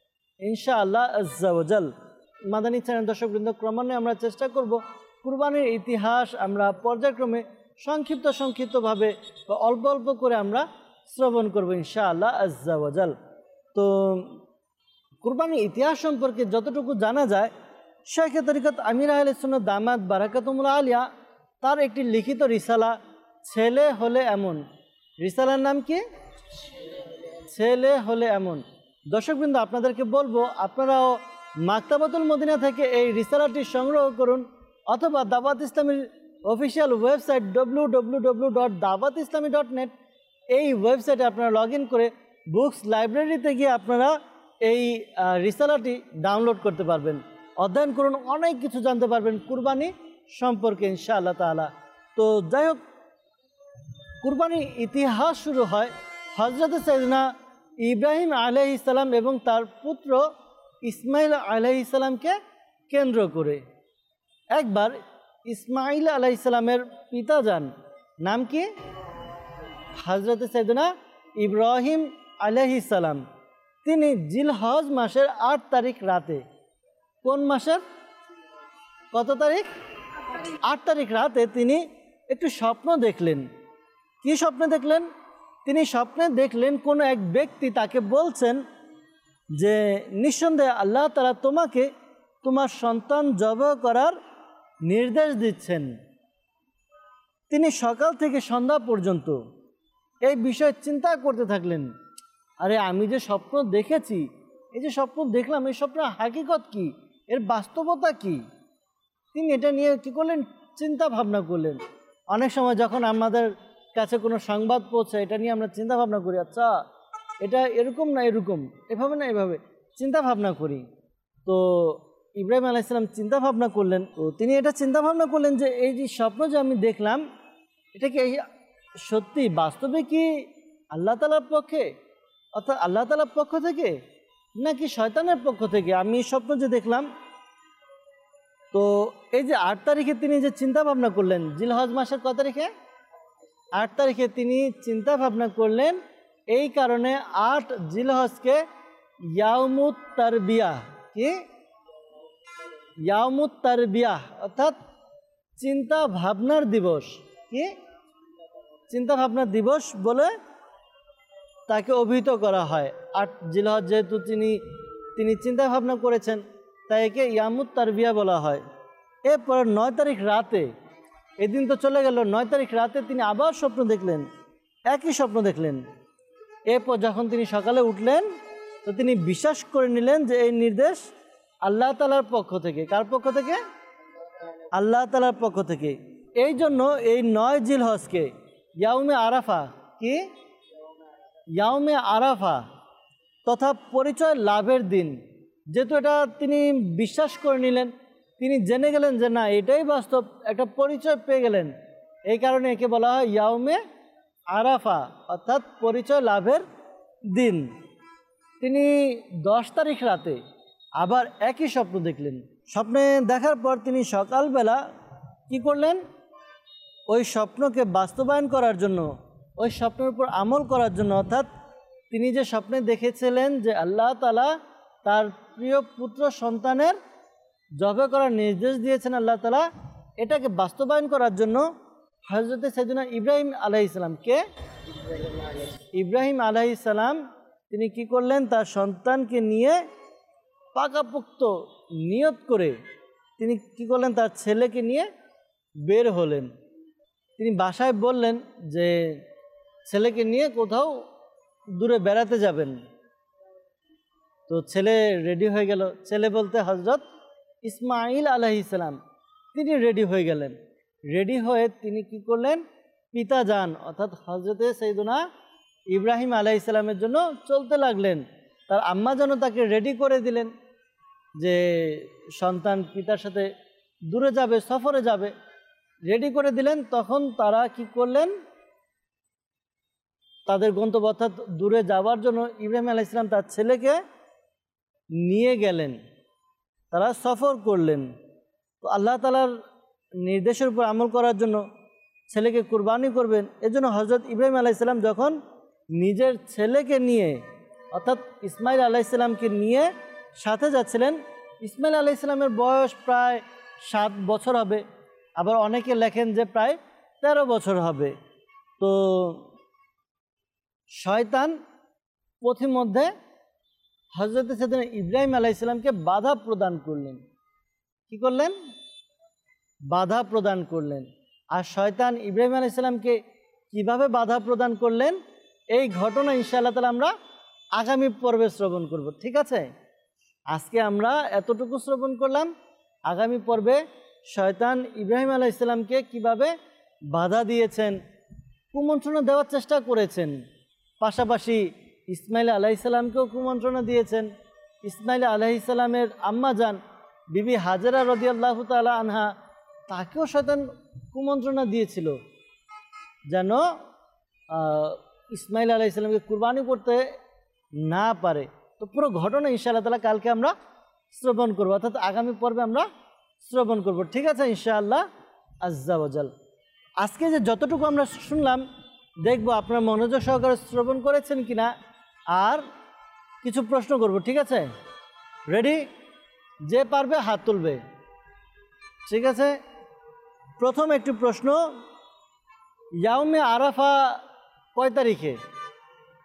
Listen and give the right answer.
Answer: 9 তারিখে।